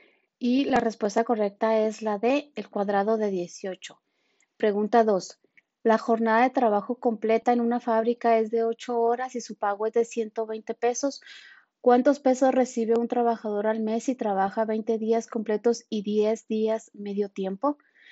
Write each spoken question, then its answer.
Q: La jornada de trabajo completa en una fábrica es de 8 horas y su pago es de 120 pesos. ¿Cuántos pesos recibe un trabajador al mes si trabaja 20 días completos y 10 días medio tiempo?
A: Y la respuesta correcta es la C, 3000.